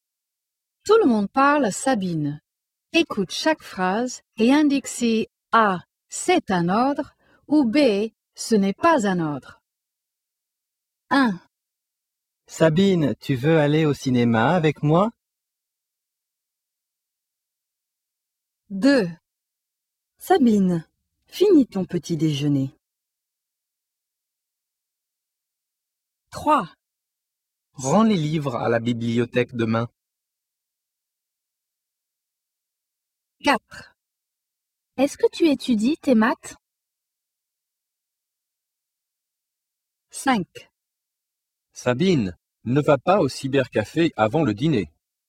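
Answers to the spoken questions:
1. B: ce n'est pas un ordre
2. A: c'est un ordre
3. A: c'est un ordre
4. B: ce n'est pas un ordre
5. A: c'est un ordre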